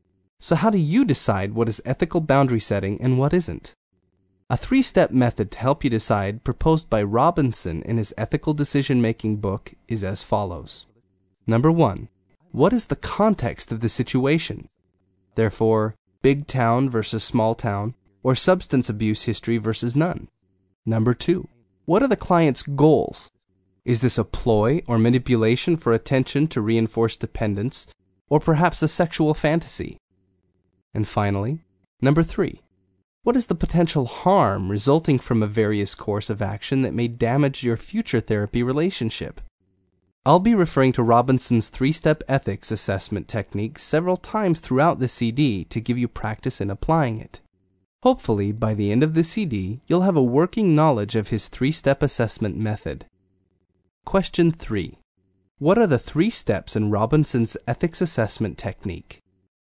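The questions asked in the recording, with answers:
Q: What are the three steps in Robinson's ethics assessment technique?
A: 1) What is the context of the situation; 2) What are the client's goals; 3) What is the potential harm resulting from a course of action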